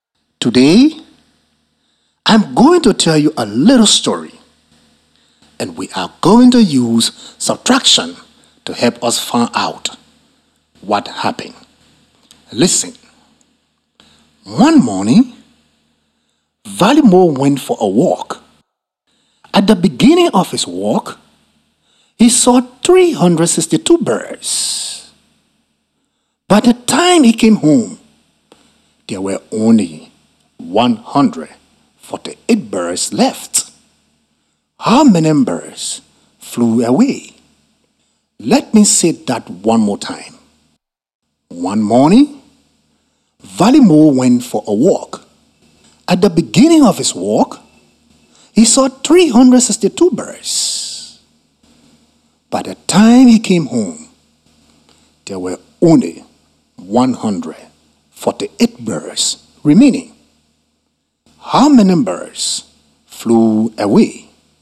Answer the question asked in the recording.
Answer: This means that 214 birds flew away.